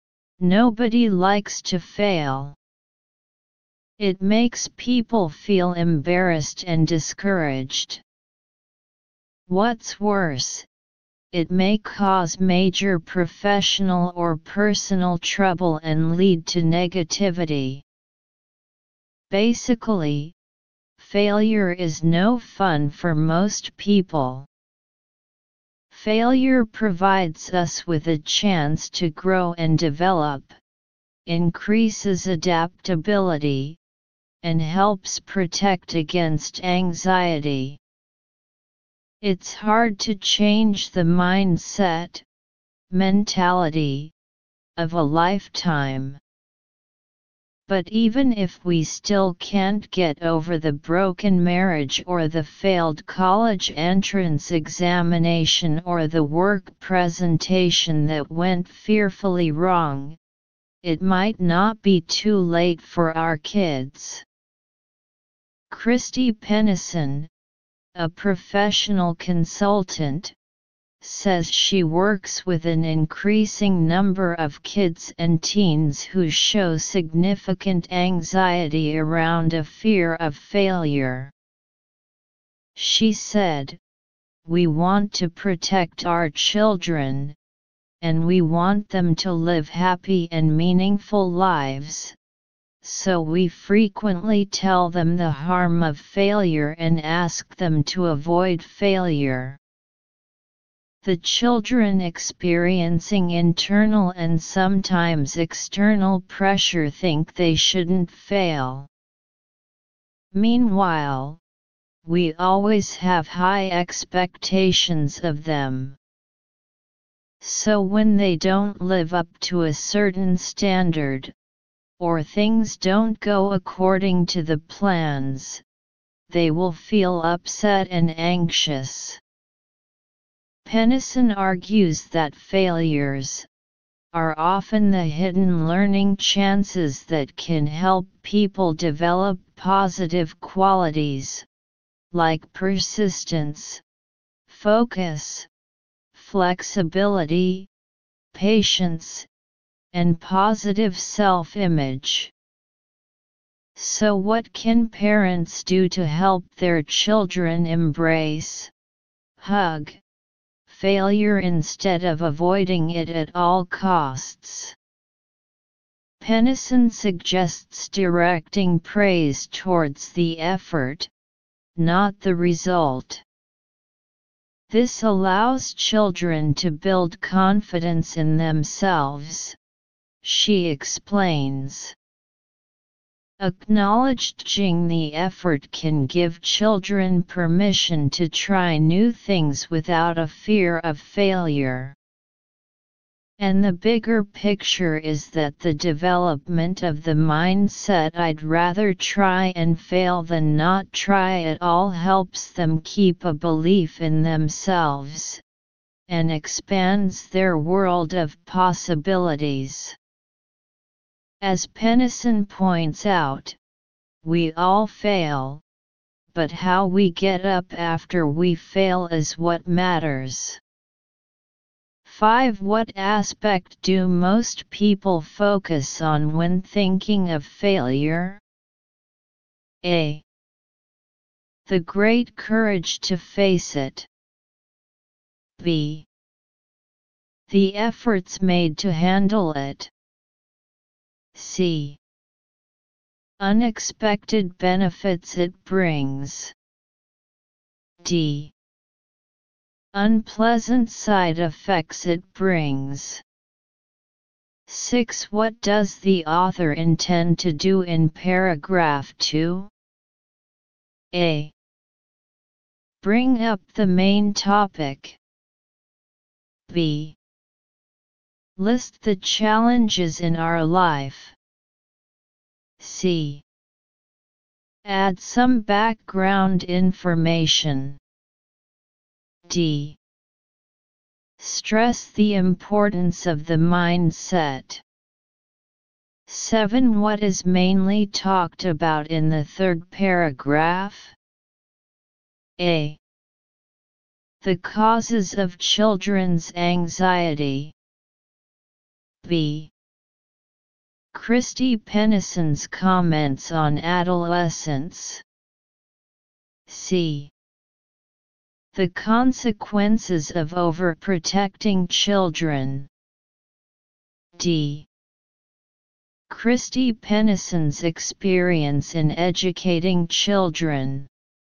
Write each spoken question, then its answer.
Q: What aspect do most people focus on when thinking of failure?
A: So choose option D.